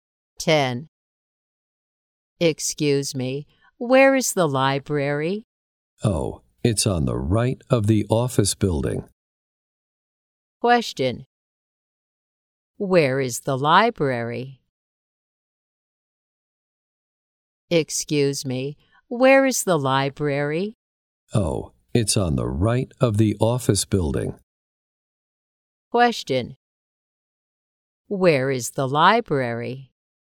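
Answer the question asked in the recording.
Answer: On the right of the office building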